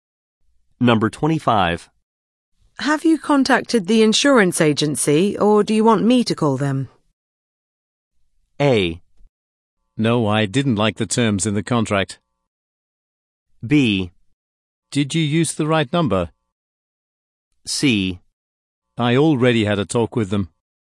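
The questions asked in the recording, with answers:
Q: Have you contacted the insurance agency, or do you want me to call them?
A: C: I already had a talk with them.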